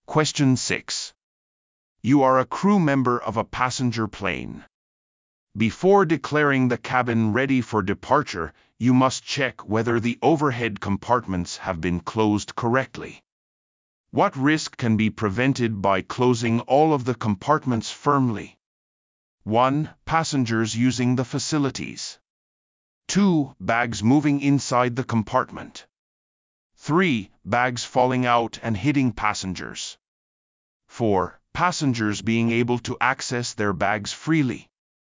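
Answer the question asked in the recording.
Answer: 3: Bags falling out and hitting passengers.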